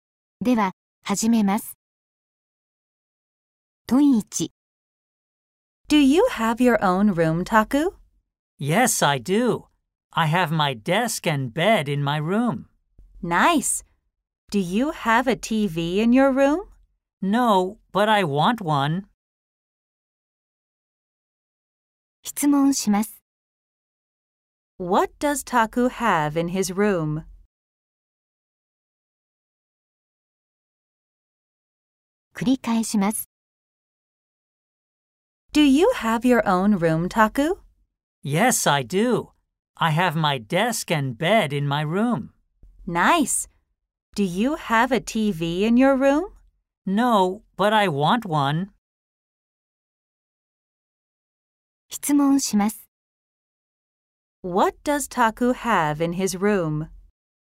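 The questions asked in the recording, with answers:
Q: What does Taku have in his room?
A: A desk and a bed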